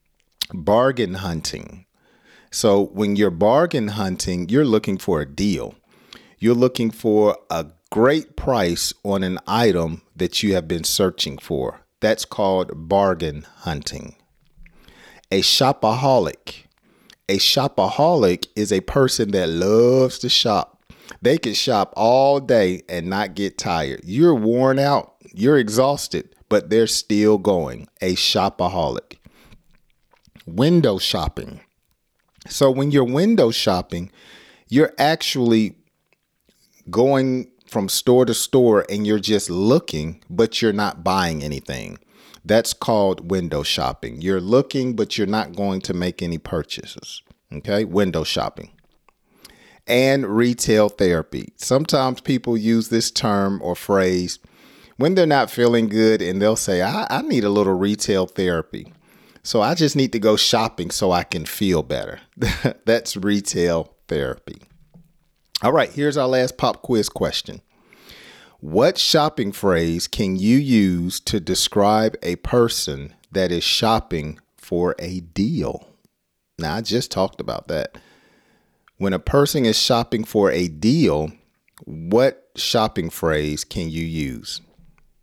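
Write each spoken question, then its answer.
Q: What shopping phrase can you use to describe a person that is shopping for a deal?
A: bargain hunting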